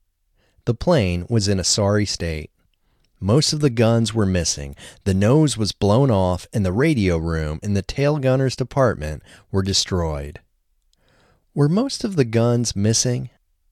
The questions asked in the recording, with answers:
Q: Were most of the guns missing?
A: Yes, most of the guns were missing.